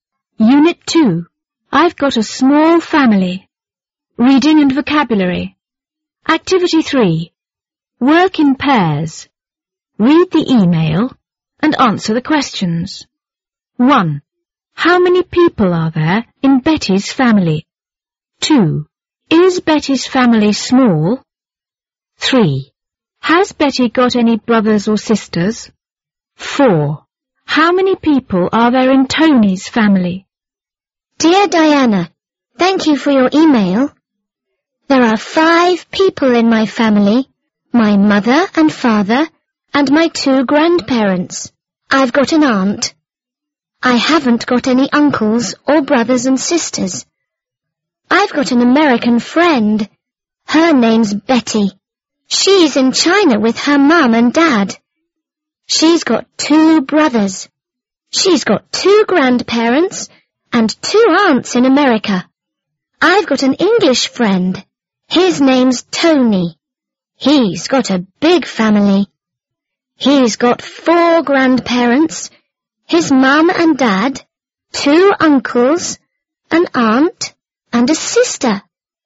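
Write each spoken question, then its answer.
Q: Has Betty got any brothers or sisters?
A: Yes, she's got two brothers.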